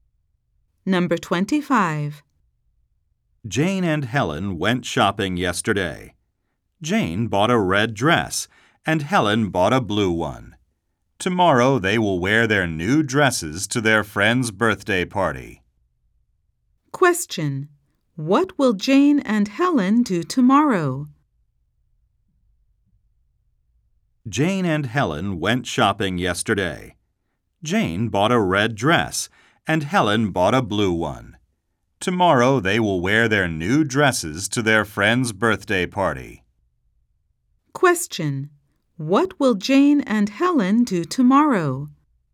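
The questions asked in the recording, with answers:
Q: What will Jane and Helen do tomorrow?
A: Go to their friend's birthday party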